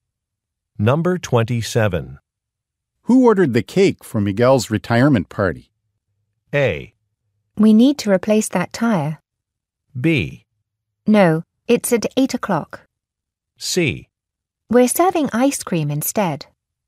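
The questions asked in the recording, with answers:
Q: Who ordered the cake for Miguel's retirement party?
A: C: We're serving ice cream instead.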